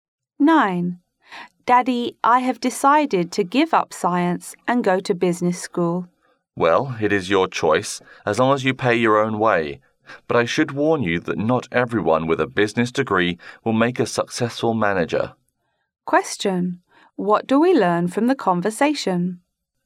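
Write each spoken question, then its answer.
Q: What do we learn from the conversation?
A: The father lets the son choose business school but he must pay for it himself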